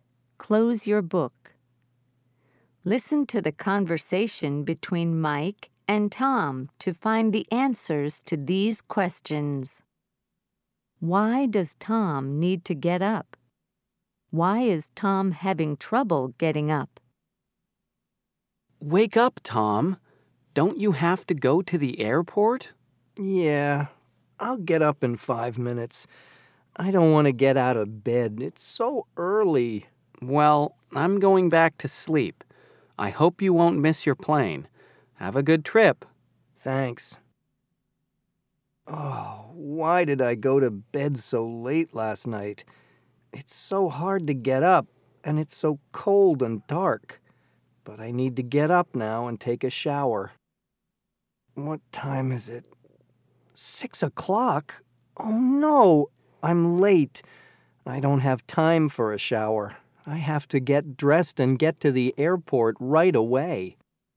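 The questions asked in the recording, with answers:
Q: Why does Tom need to get up?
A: He has to go to the airport to catch his plane.

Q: Why is Tom having trouble getting up?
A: He went to bed late last night, and it's early, cold and dark.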